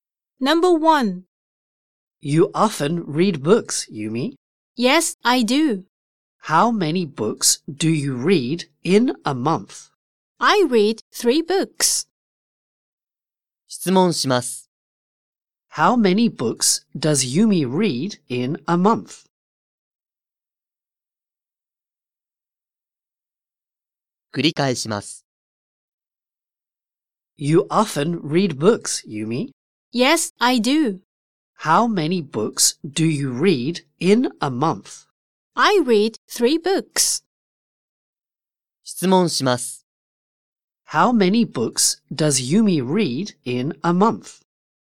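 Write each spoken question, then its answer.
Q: How many books does Yumi read in a month?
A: Three books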